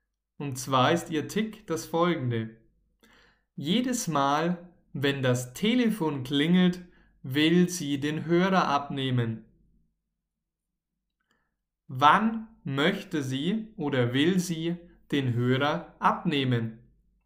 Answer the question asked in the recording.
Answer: jedes Mal, wenn das Telefon klingelt.